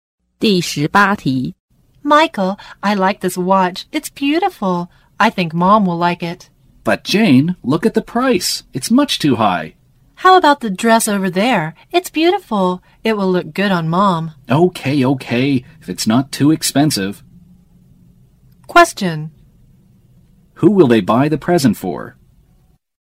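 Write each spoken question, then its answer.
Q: Who will they buy the present for?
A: Their mom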